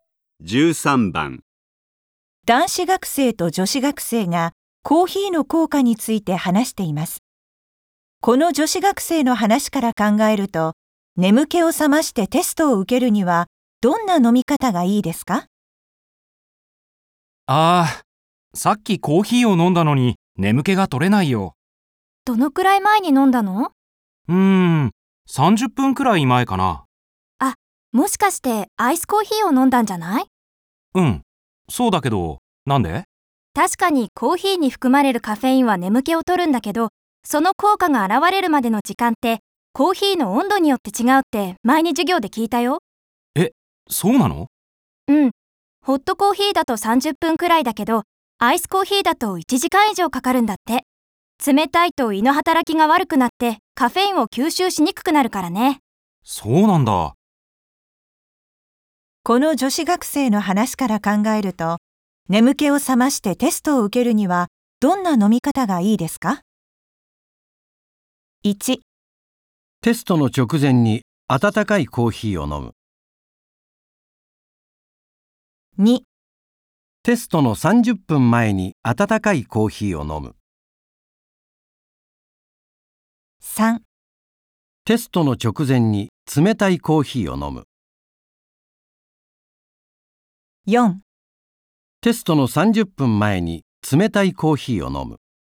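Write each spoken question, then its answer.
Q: この女子学生の話から考えると、眠気を覚ましてテストを受けるにはどんな飲み方がいいですか?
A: 2: テストの30分前に温かいコーヒーを飲む。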